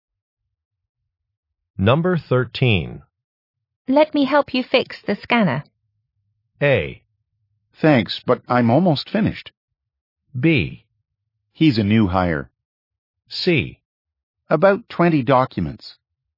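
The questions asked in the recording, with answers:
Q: Let me help you fix the scanner.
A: A: Thanks, but I'm almost finished.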